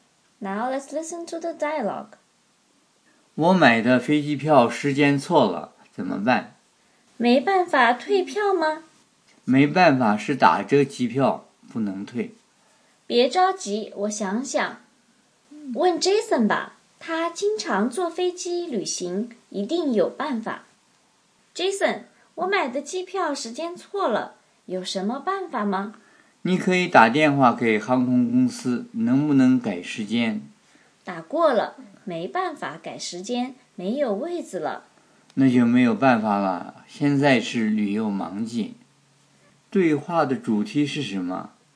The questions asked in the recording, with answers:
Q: 对话的主题是什么?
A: 机票时间错了,怎么办?有什么办法吗?